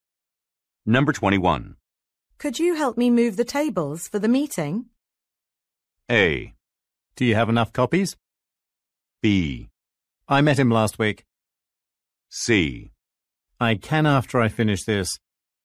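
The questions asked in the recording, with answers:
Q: Could you help me move the tables for the meeting?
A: C: I can after I finish this.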